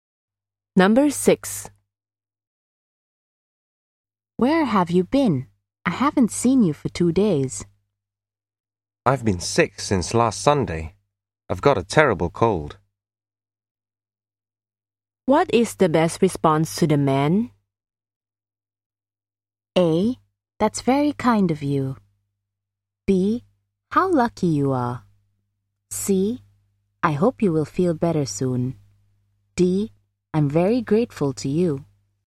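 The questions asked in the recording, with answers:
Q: What is the best response to the man?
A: C: I hope you will feel better soon.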